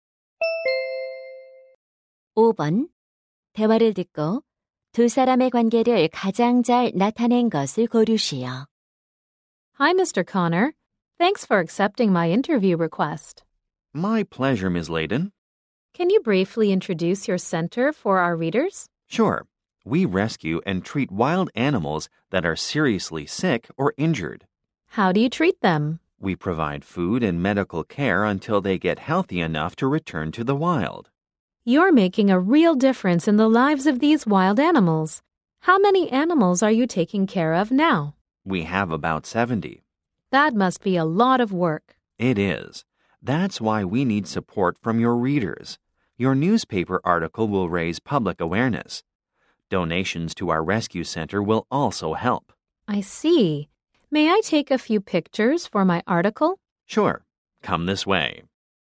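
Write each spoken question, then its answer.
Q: 대화를 듣고 두 사람의 관계를 가장 잘 나타낸 것을 고르시오.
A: 신문 기자 - 야생동물 구조센터 운영자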